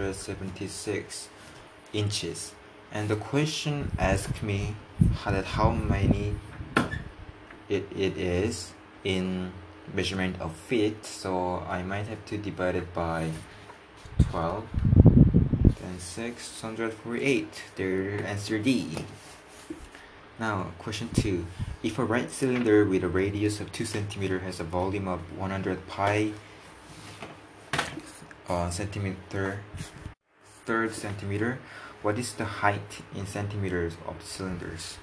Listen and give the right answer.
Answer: the height might be 25